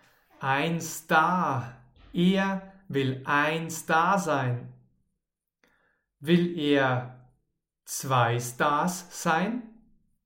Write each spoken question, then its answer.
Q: Will er zwei Stars sein?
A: Nein, er will nicht zwei Stars sein.